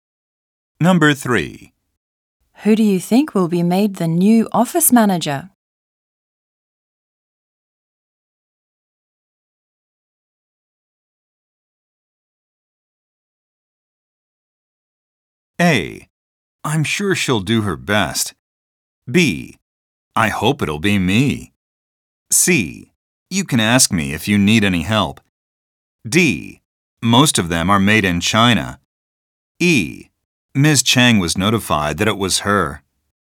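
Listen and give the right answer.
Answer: B: I hope it'll be me. / E: Ms. Chang was notified that it was her.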